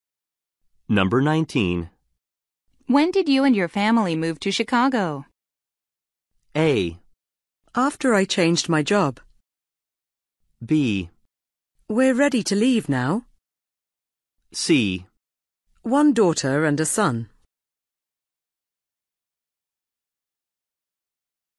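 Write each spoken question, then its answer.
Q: When did you and your family move to Chicago?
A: A: After I changed my job.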